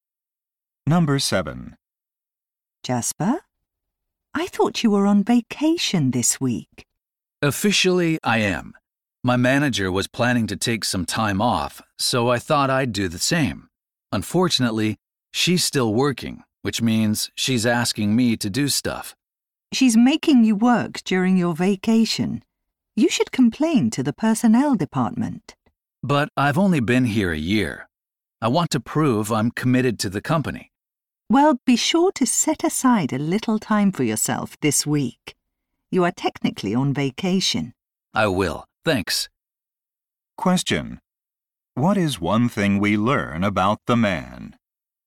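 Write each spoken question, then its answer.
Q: What is one thing we learn about the man?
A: He is being asked to work during his vacation.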